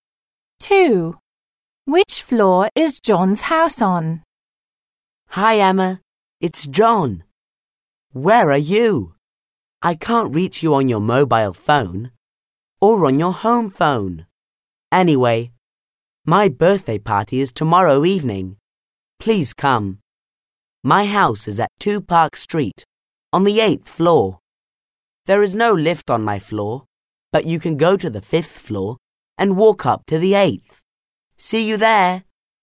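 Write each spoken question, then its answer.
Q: Which floor is John's house on?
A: The 8th floor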